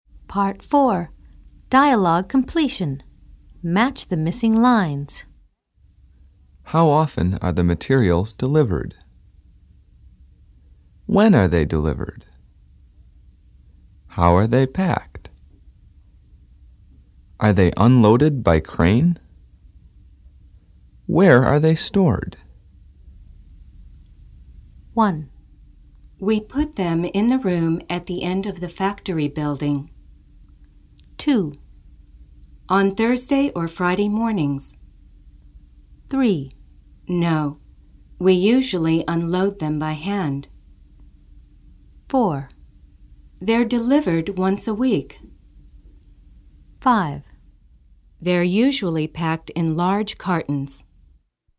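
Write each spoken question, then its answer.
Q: How often are the materials delivered?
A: 4: They're delivered once a week.

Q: When are they delivered?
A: 2: On Thursday or Friday mornings.

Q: How are they packed?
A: 5: They're usually packed in large cartons.

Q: Are they unloaded by crane?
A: 3: No, we usually unload them by hand.

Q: Where are they stored?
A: 1: We put them in the room at the end of the factory building.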